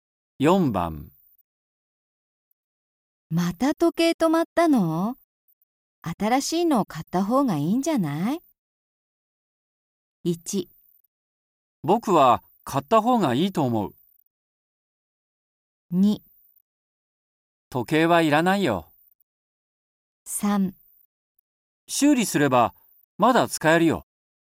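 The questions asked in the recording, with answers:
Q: また時計止まったの?新しいのを買った方がいいんじゃない?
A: 3: 修理すればまだ使えるよ。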